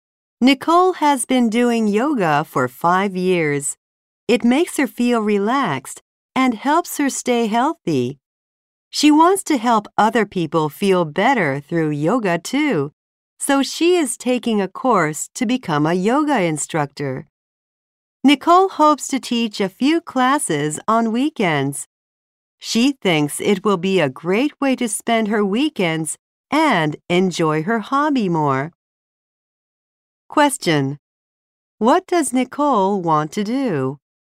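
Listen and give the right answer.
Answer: Teach yoga classes on weekends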